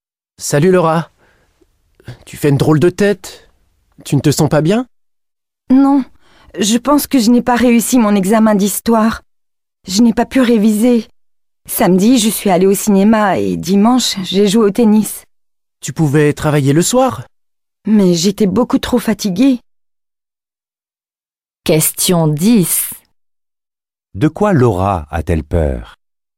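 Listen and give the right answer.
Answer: D'avoir raté son examen d'histoire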